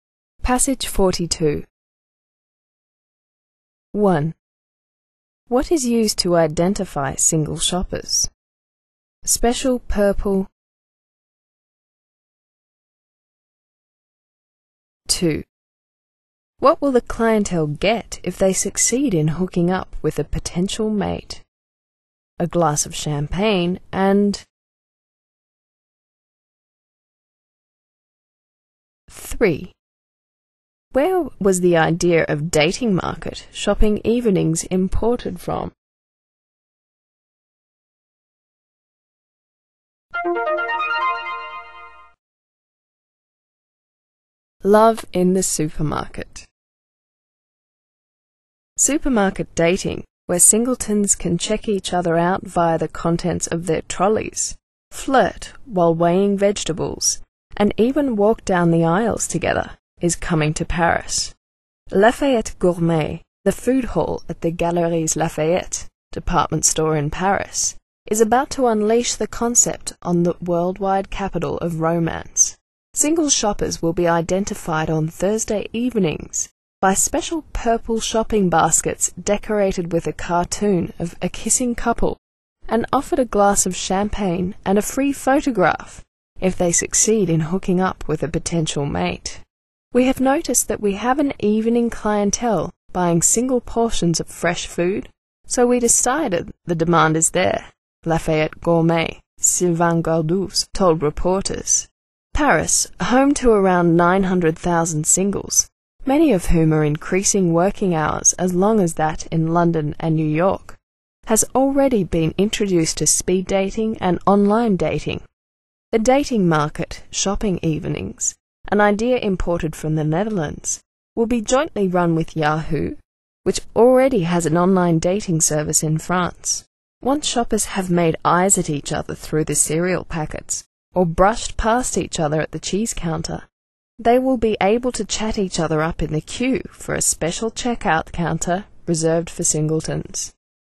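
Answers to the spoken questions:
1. Special purple shopping baskets decorated with a cartoon of a kissing couple
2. A glass of champagne and a free photograph
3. The Netherlands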